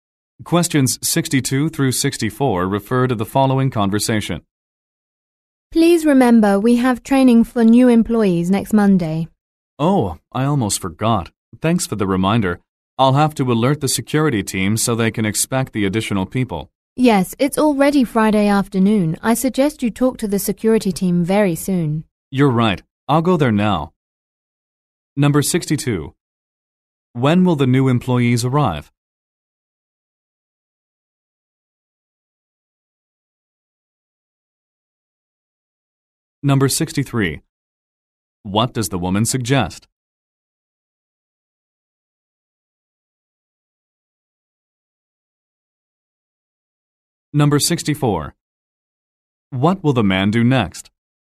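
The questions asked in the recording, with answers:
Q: When will the new employees arrive?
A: Next Monday

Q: What does the woman suggest?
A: Talking to the security team soon

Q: What will the man do next?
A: Go to the security team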